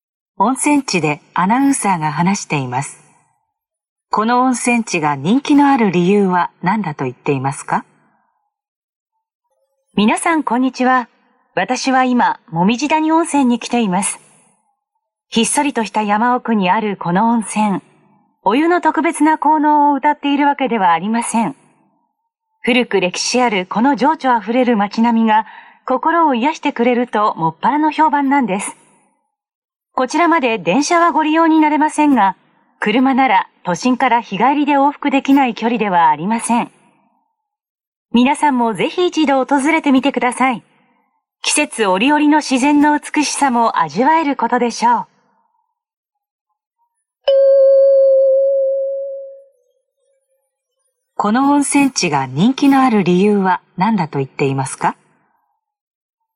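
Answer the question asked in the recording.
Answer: 古く歴史ある情緒あふれる街並みが心を癒してくれるから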